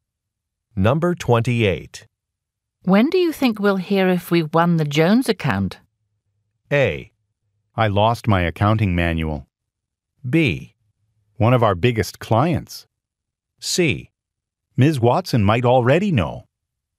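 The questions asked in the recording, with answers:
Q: When do you think we'll hear if we won the Jones account?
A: C: Ms. Watson might already know.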